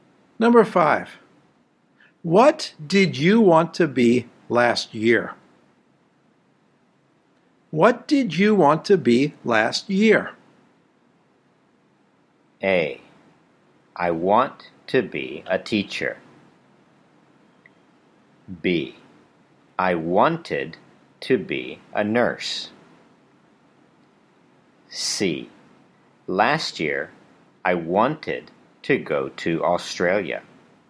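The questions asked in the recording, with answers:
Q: What did you want to be last year?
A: B: I wanted to be a nurse.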